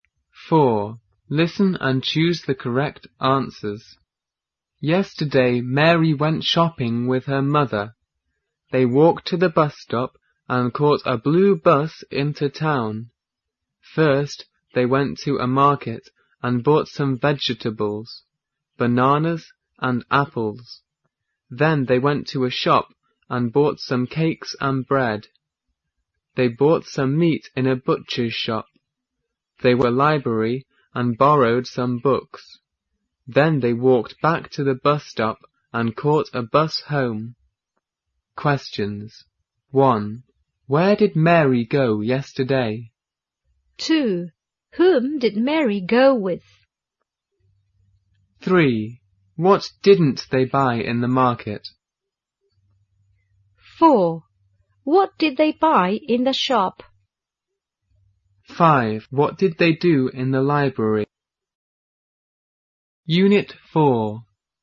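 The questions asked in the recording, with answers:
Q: Where did Mary go yesterday?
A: She went shopping in town.

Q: Whom did Mary go with?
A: Her mother.

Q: What did they buy in the shop?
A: Some cakes and bread.

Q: What did they do in the library?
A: They borrowed some books.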